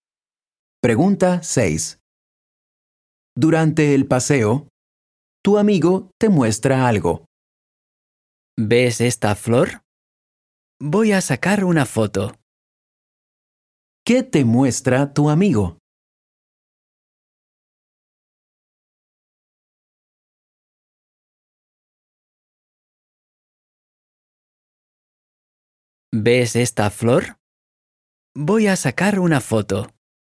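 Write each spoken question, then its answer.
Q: ¿Qué te muestra tu amigo?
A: Una flor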